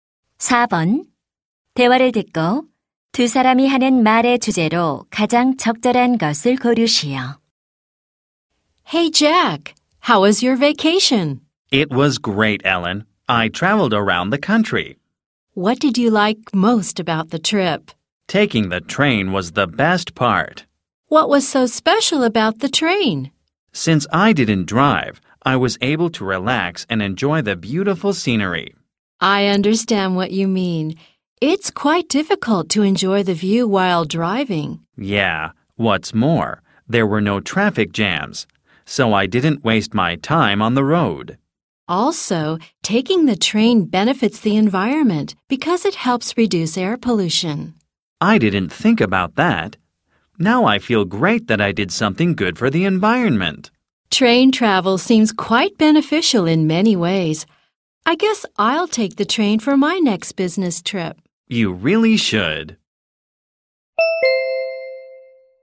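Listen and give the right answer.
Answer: 기차 여행의 장점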